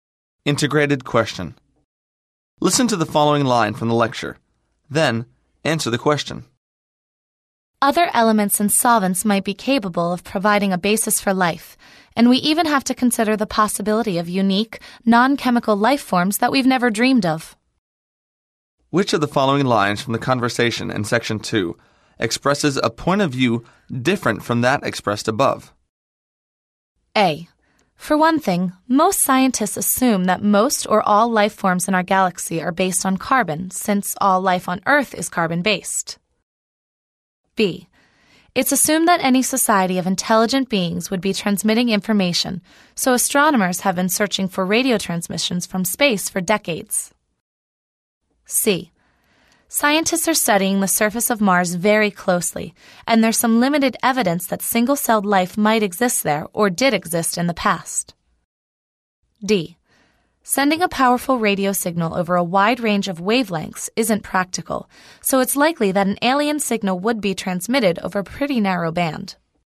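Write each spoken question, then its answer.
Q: Which of the following lines from the conversation in Section 2 expresses a point of view different from that expressed above?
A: A: For one thing, most scientists assume that most or all life forms in our galaxy are based on carbon, since all life on Earth is carbon-based.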